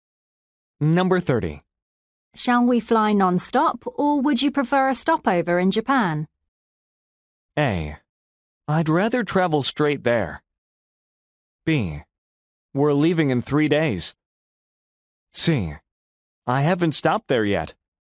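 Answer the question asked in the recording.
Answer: A: I'd rather travel straight there.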